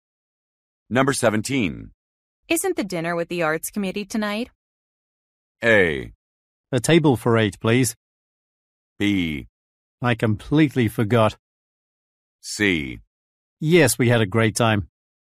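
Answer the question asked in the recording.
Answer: B: I completely forgot.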